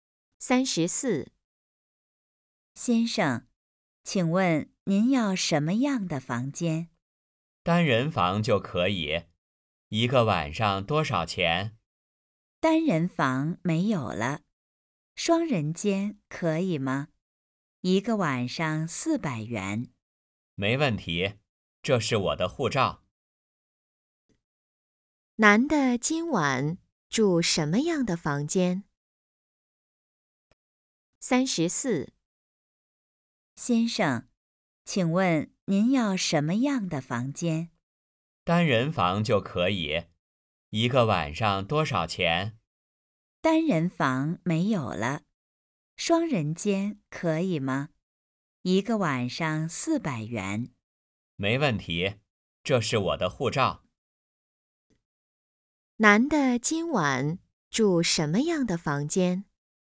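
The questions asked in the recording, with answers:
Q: 男的今晚住什么样的房间?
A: 双人间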